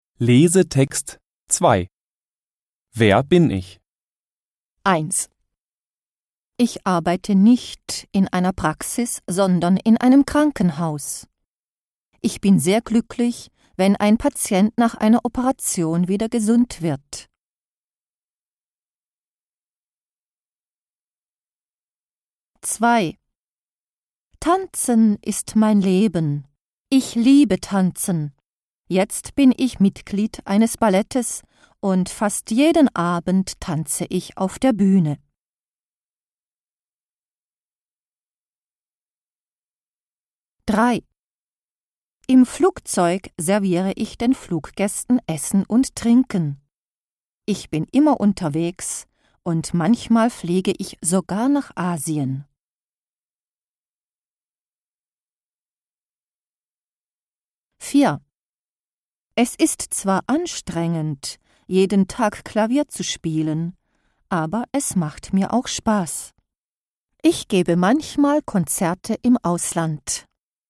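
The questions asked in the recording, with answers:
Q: Wer bin ich?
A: Balletttänzer(in)

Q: Wer bin ich?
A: Flugbegleiter(in)

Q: Wer bin ich?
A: Pianist(in)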